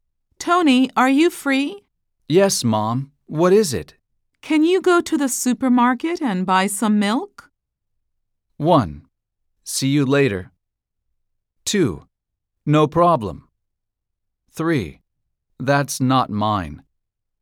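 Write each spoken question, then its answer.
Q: Can you go to the supermarket and buy some milk?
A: 2: No problem.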